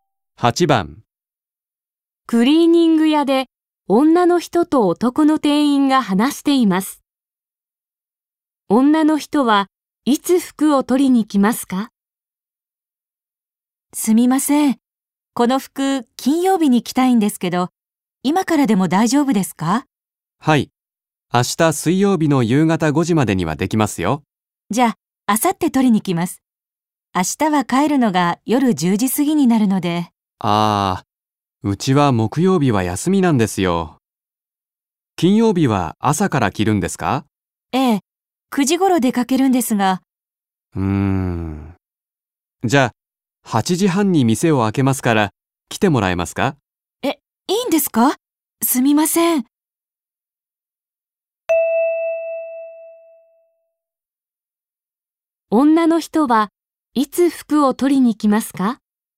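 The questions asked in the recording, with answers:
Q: 女の人はいつ服を取りに来ますか?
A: 金曜日の朝8時半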